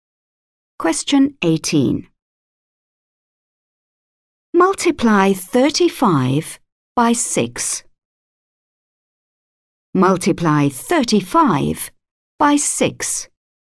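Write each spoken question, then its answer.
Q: Multiply 35 by 6.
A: 210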